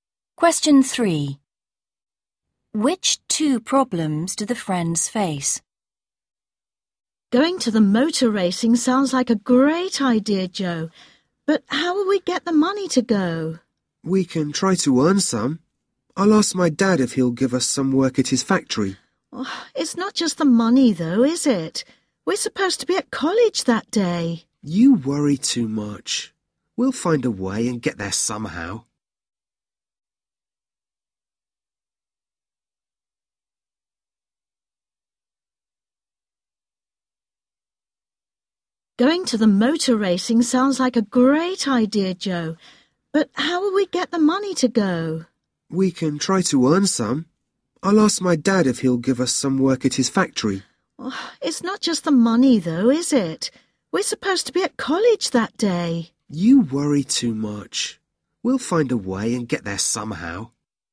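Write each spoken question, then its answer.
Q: Which two problems do the friends face?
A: Getting the money, and they are supposed to be at college that day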